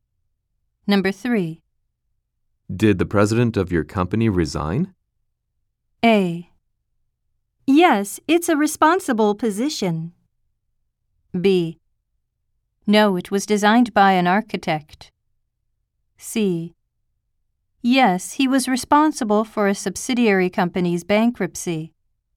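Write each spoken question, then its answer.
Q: Did the president of your company resign?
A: C: Yes, he was responsible for a subsidiary company's bankruptcy.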